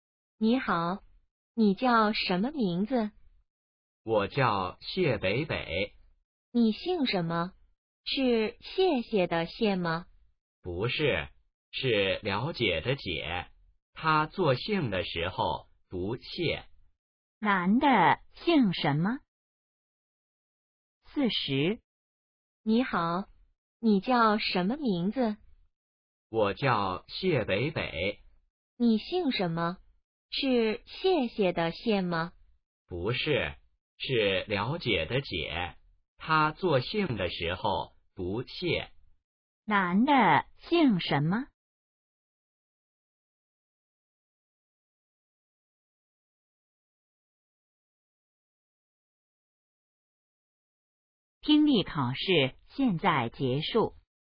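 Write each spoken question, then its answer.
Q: 男的姓什么?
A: 解(了解的解,作姓时读Xiè)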